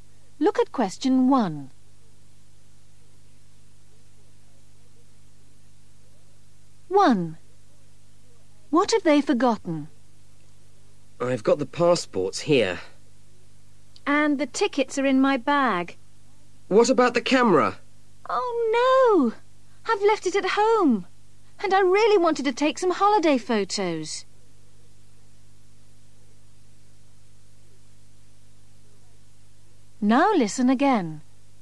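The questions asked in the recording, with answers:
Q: What have they forgotten?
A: the camera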